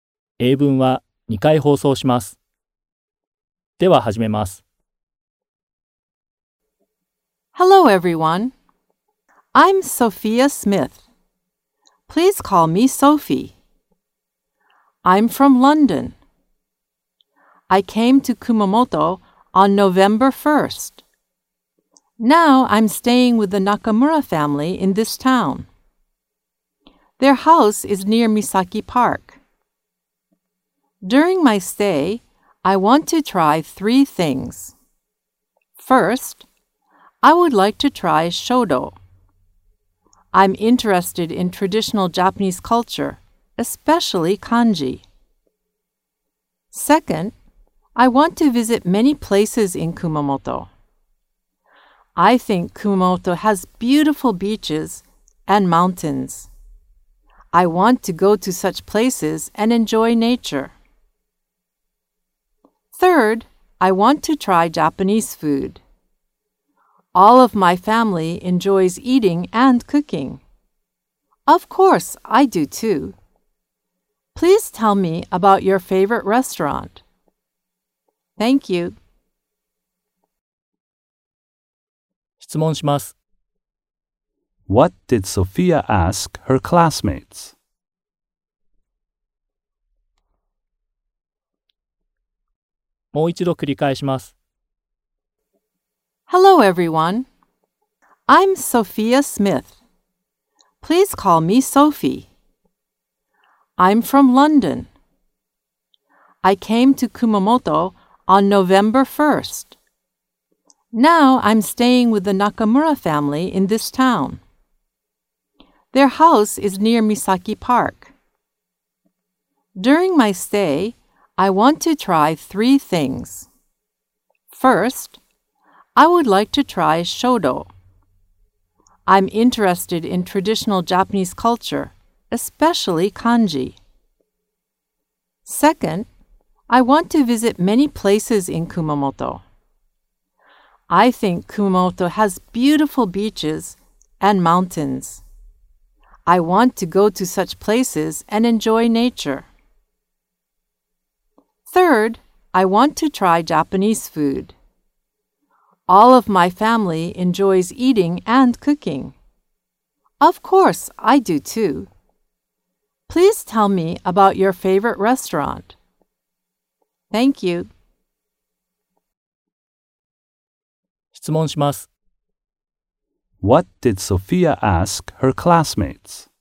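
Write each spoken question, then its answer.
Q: What did Sophia ask her classmates?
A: She asked them to tell her about their favorite restaurants.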